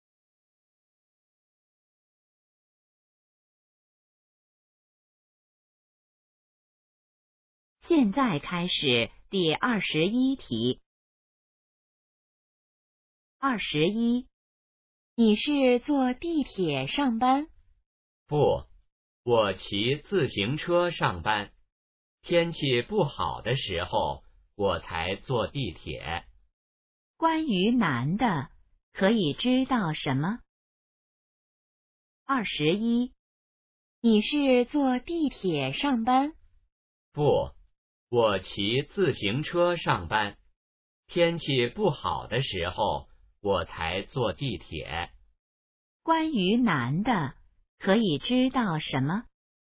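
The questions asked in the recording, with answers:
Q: 关于男的,可以知道什么?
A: 他一般骑自行车上班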